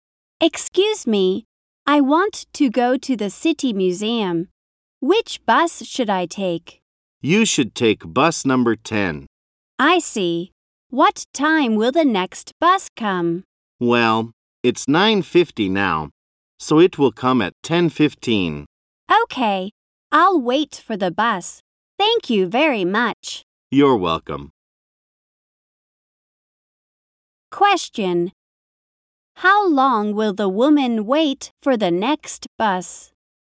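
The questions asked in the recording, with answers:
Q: How long will the woman wait for the next bus?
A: For 25 minutes.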